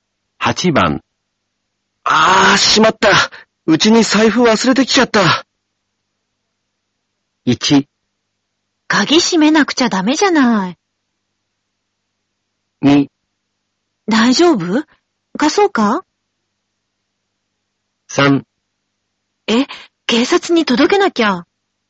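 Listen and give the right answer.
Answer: 2: 大丈夫貸そうか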